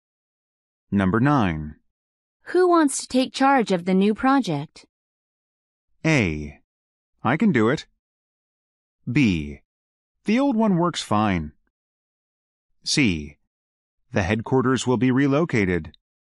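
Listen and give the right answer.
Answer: A: I can do it.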